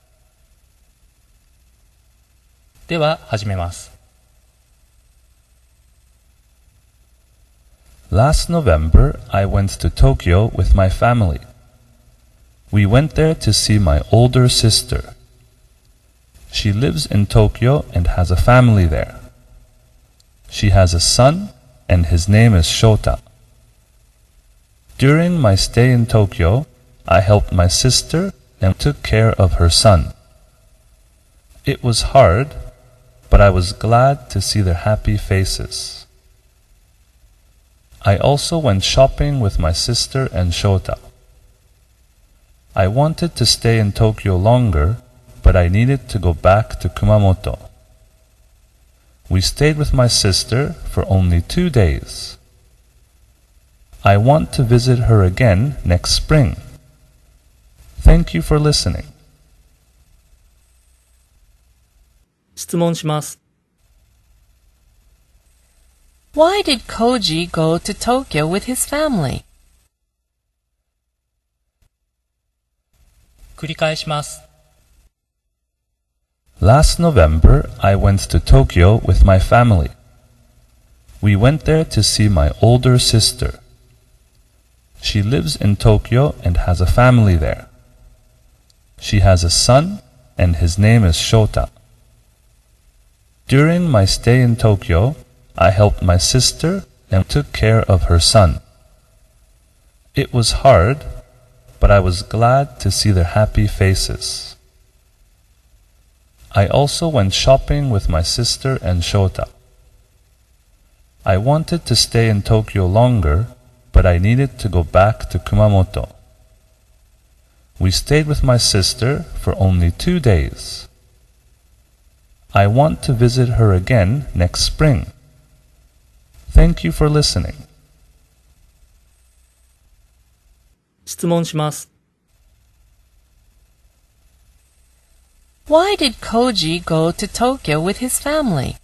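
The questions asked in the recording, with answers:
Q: Why did Koji go to Tokyo with his family?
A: To see his older sister.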